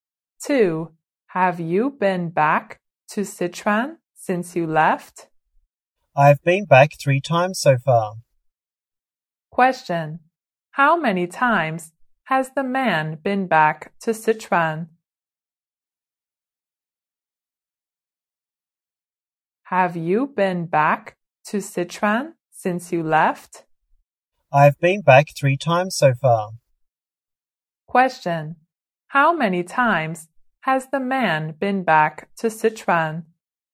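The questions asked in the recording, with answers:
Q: How many times has the man been back to Sichuan?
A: 3 times.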